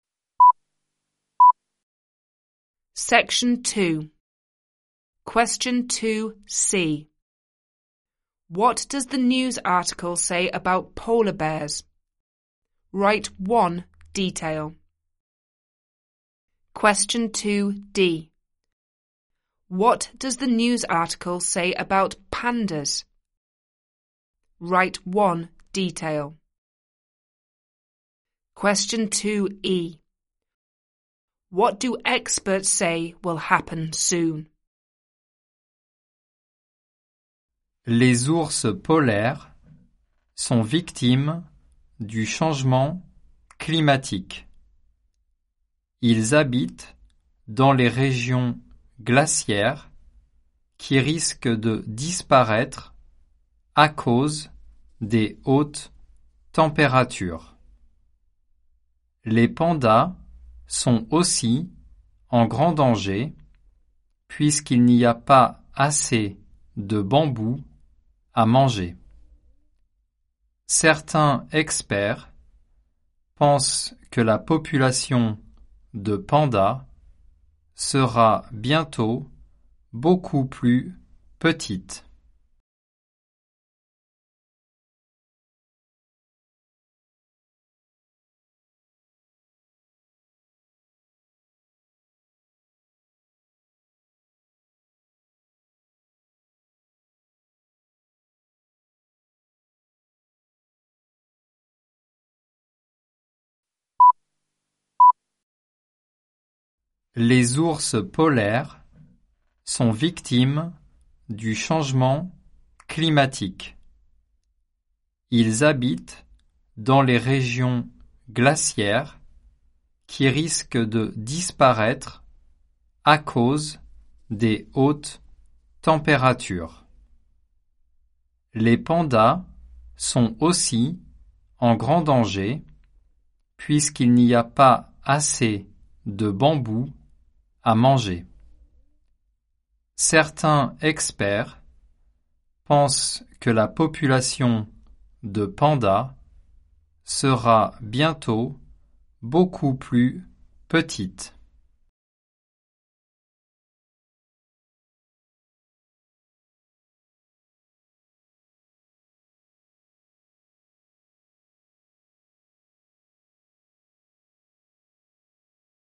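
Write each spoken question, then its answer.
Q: What does the news article say about polar bears?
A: They are victims of climate change; their icy habitats may disappear

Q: What does the news article say about pandas?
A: They are in great danger because there is not enough bamboo to eat

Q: What do experts say will happen soon?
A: The panda population will be much smaller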